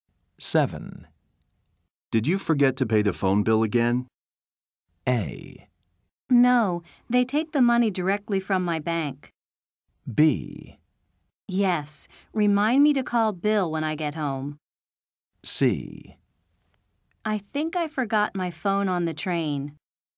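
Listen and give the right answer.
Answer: A: No, they take the money directly from my bank.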